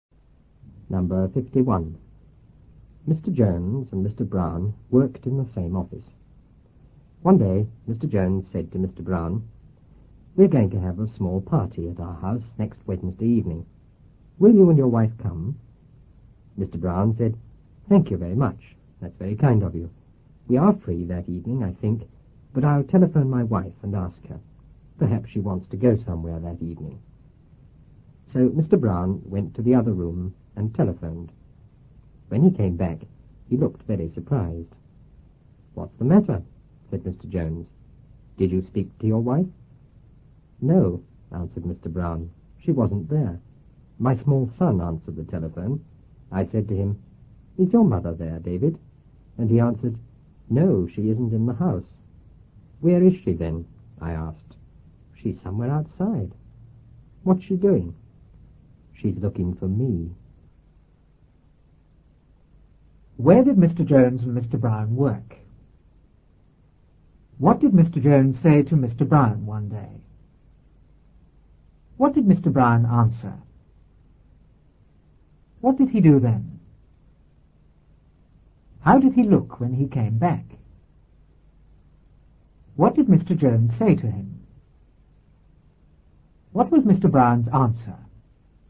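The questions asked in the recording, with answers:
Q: Where did Mr. Jones and Mr. Brown work?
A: In the same office

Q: What did Mr. Jones say to Mr. Brown one day?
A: He invited him and his wife to a small party at his house next Wednesday evening

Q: What did Mr. Brown answer?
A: Thank you, he thought they were free but would telephone his wife and ask her

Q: What did he do then?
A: He went to the other room and telephoned

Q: How did he look when he came back?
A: Very surprised

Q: What did Mr. Jones say to him?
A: What's the matter? Did you speak to your wife?

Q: What was Mr. Brown's answer?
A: No, she wasn't there; his small son answered and said she was outside looking for him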